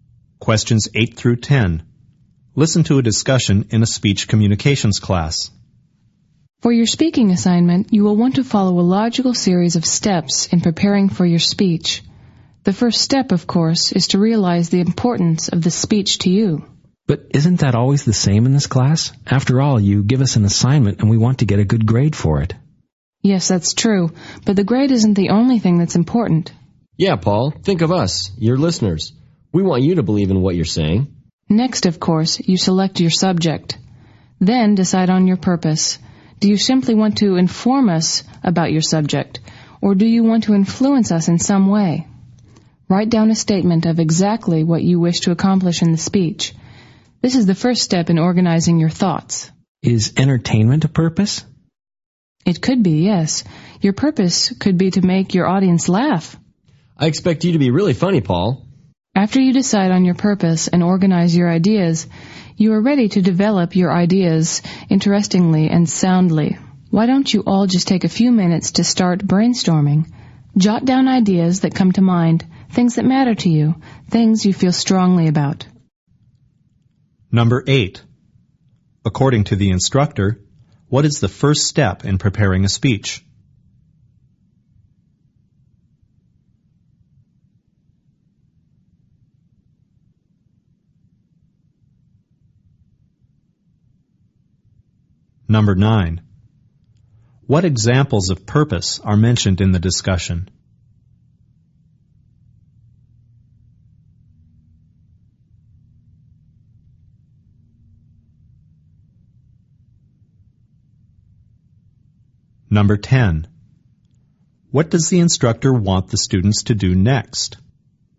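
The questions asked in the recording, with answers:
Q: According to the instructor, what is the first step in preparing a speech?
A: Realize the importance of the speech to you

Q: What examples of purpose are mentioned in the discussion?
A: To inform, to influence, and to entertain

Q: What does the instructor want the students to do next?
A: Brainstorm ideas for the speech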